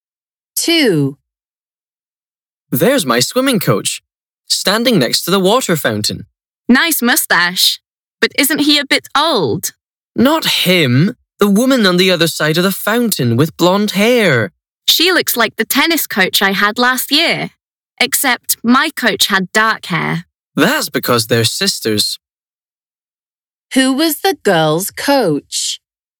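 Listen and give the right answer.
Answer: The blonde-haired woman on the other side of the fountain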